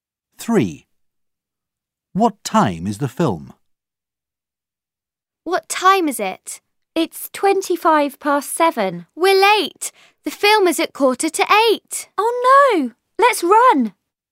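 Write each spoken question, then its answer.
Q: What time is the film?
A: 7:45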